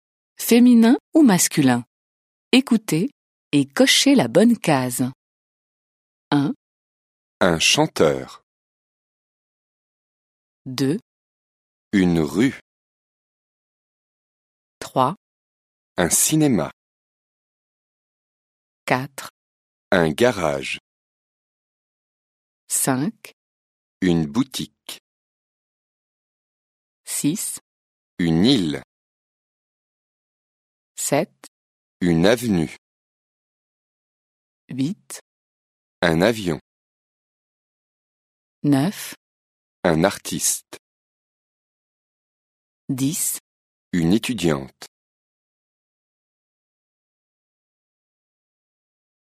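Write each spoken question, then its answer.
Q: Un chanteur.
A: masculin

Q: Une rue.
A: féminin

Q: Un cinéma.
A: masculin

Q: Un garage.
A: masculin

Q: Une boutique.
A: féminin

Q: Une île.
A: féminin

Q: Une avenue.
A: féminin

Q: Un avion.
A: masculin

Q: Un artiste.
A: masculin

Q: Une étudiante.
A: féminin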